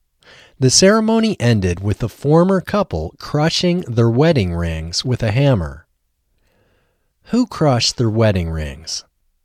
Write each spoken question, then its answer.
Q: Who crushed their wedding rings?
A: The former couple crushed their wedding rings.